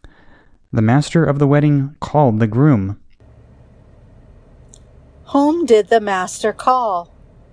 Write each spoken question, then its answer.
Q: Whom did the master call?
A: The master called the groom.